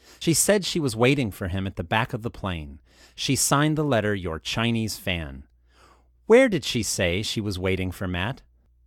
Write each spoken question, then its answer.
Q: Where did she say she was waiting for Matt?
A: She said she was waiting for Matt at the back of the plane.